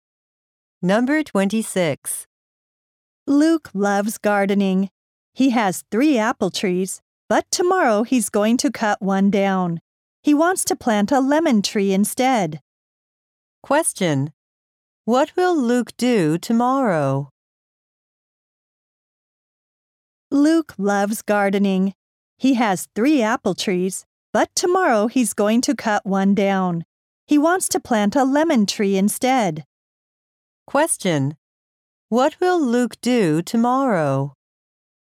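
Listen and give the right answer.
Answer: Cut down an apple tree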